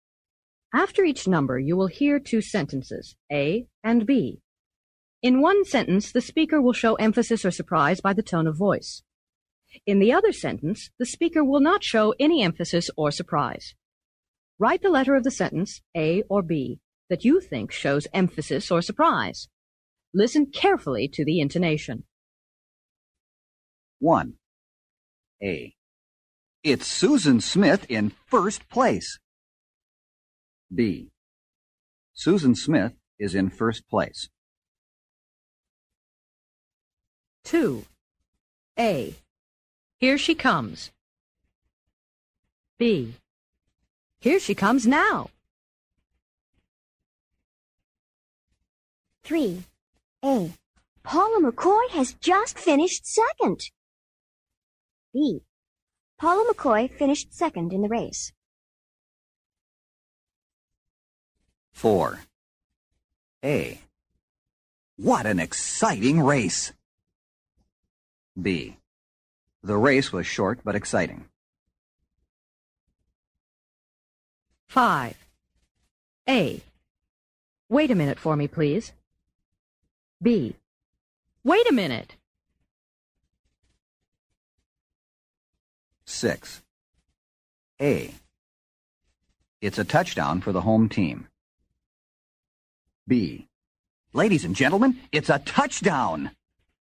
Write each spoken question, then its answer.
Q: A. What an exciting race! B. The race was short but exciting.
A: What an exciting race!